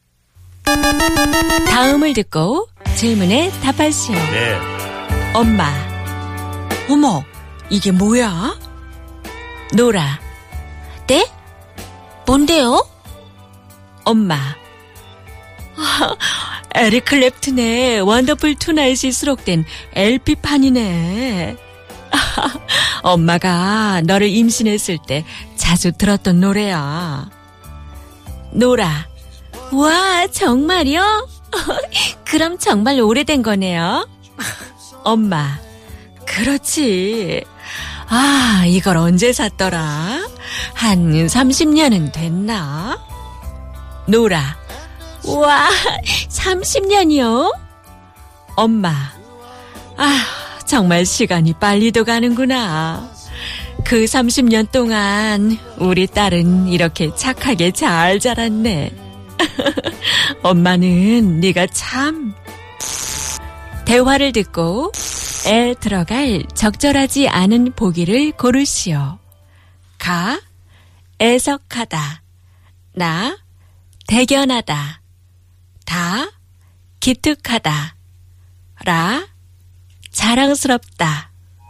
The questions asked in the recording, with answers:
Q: 대화를 듣고 애 들어갈 적절하지 않은 보기를 고르시오.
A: 가! We can't say that someone is 착하게 자랐어 and be like, it's pitiful.